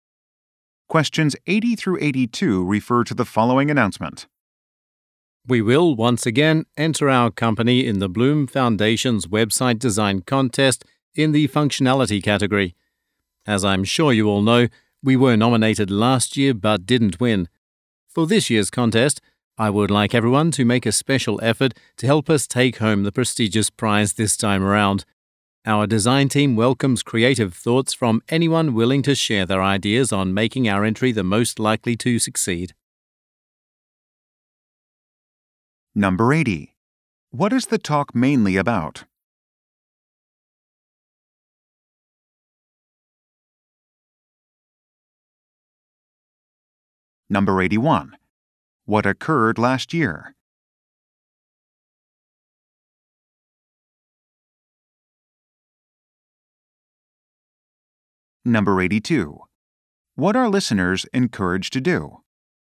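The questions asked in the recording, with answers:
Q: What is the talk mainly about?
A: A website design contest

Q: What occurred last year?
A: The company was nominated but didn't win

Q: What are listeners encouraged to do?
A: Share ideas with the design team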